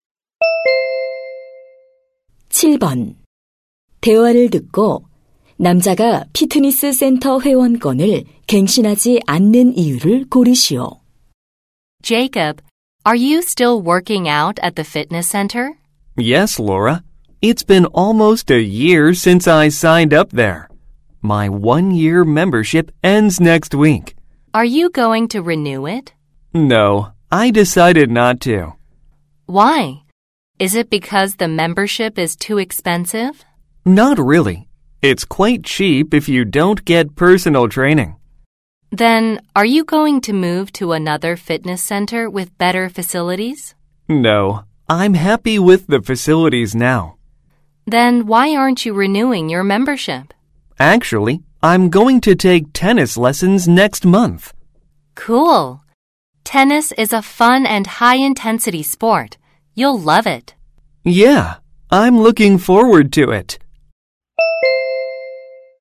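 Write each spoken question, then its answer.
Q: 대화를 듣고 남자가 피트니스 센터 회원권을 갱신하지 않는 이유를 고르시오.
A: 다음 달에 테니스 레슨을 받을 예정이라서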